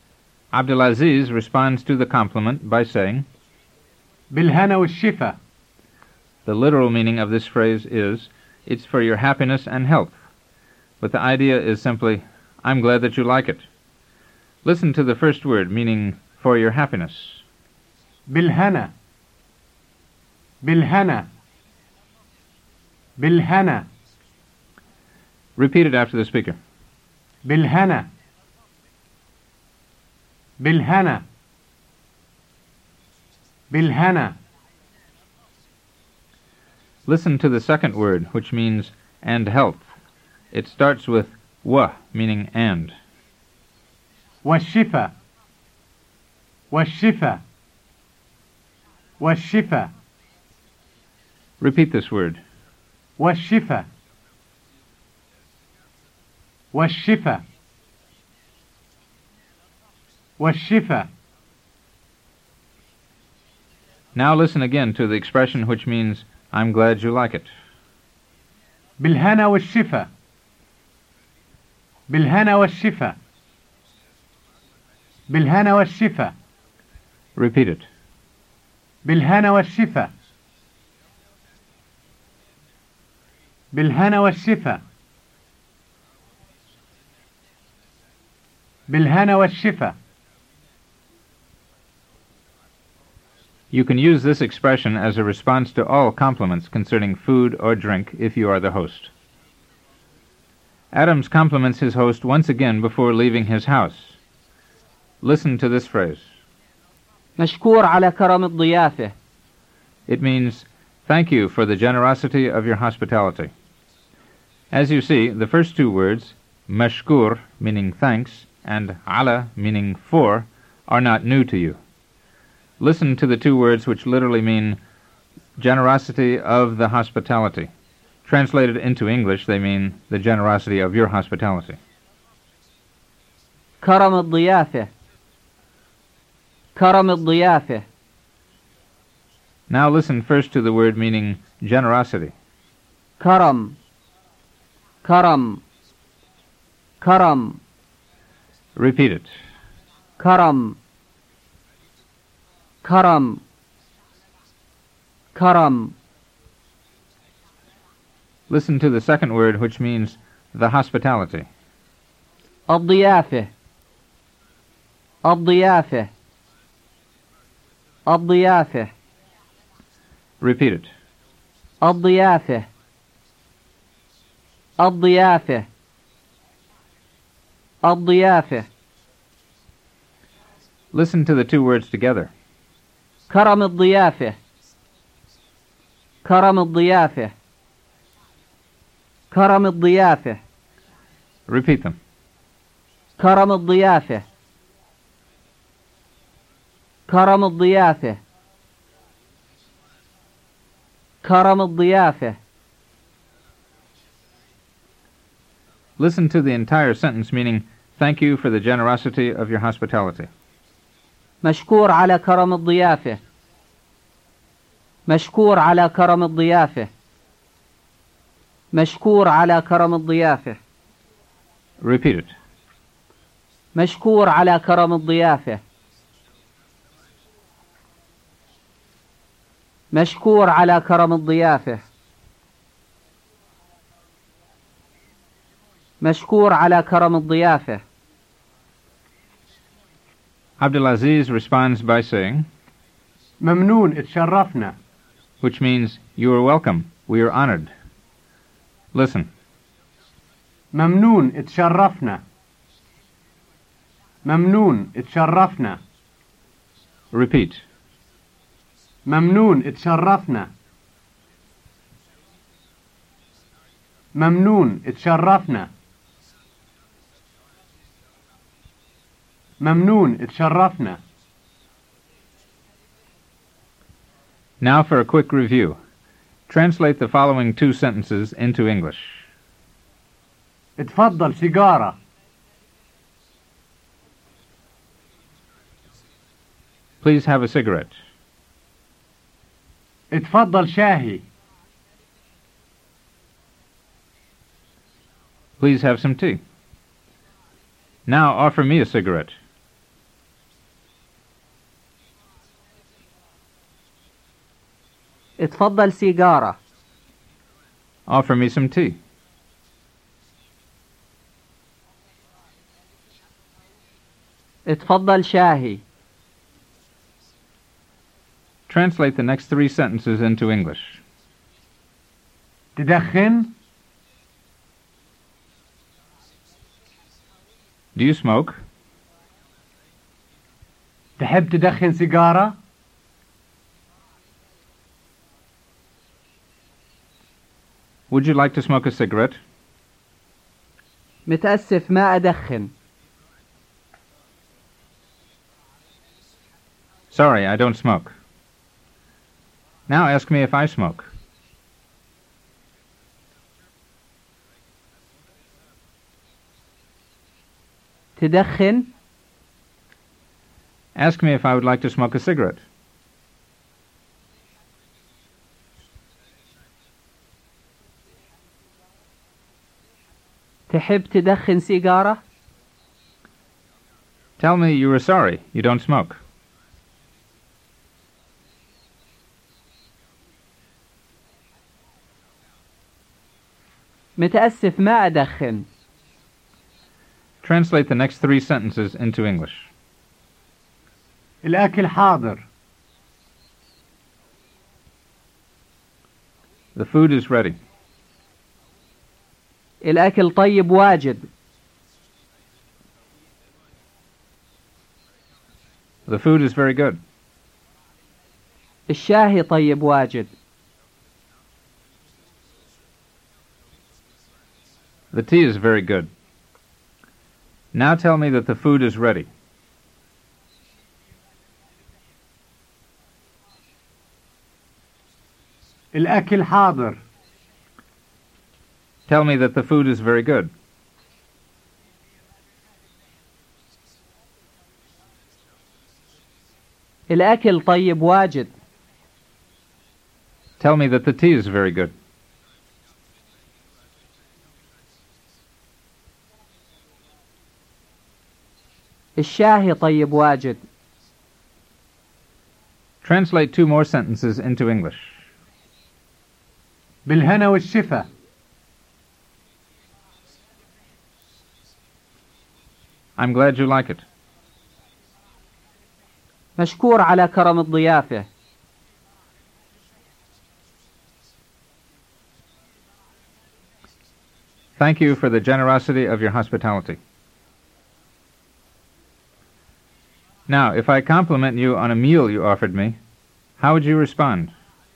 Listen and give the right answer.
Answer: بالهنا والشفا.